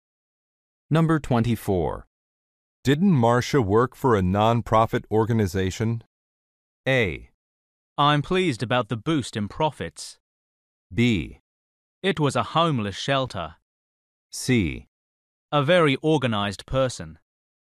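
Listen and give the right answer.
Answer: B: It was a homeless shelter.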